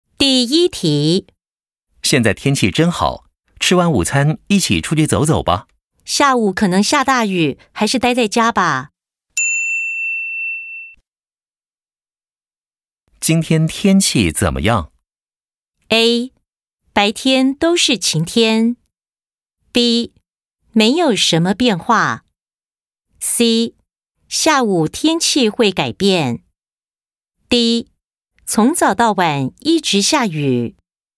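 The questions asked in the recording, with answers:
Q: 今天天气怎么样?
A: C: 下午天气会改变。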